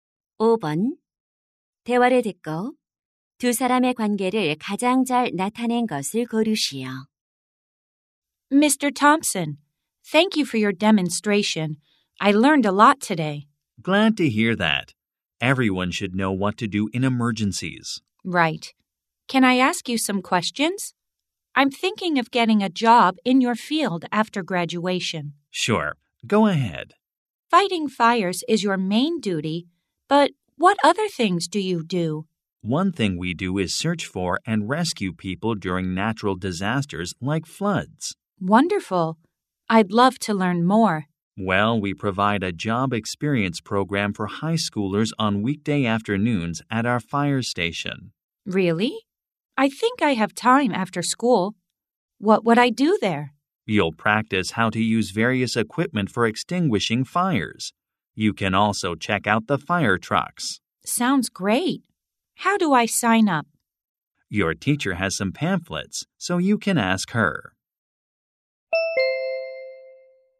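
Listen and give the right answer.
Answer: 소방관 - 고등학생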